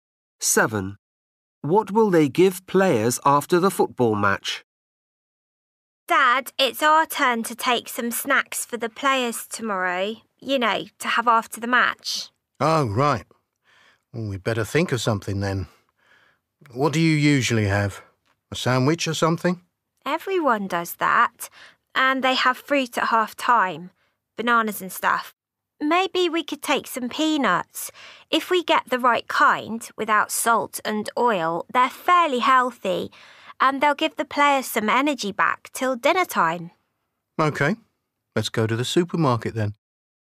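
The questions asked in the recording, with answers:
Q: What will they give players after the football match?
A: peanuts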